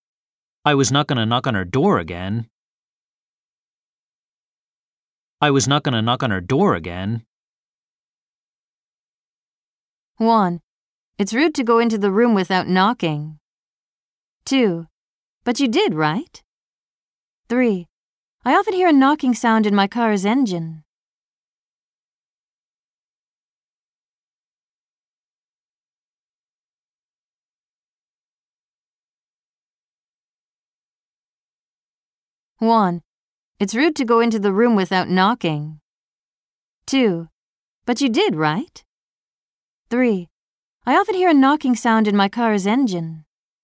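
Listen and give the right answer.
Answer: 2: But you did, right?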